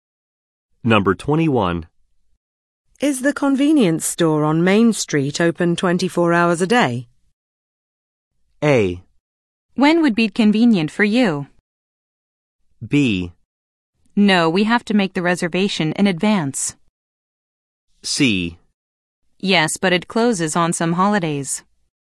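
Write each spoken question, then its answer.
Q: Is the convenience store on Main Street open 24 hours a day?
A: C: Yes, but it closes on some holidays.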